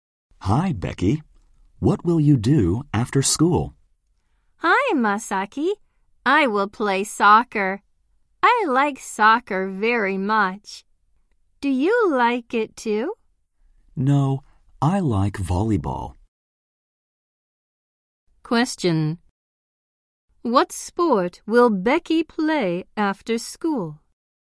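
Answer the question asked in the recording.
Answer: Soccer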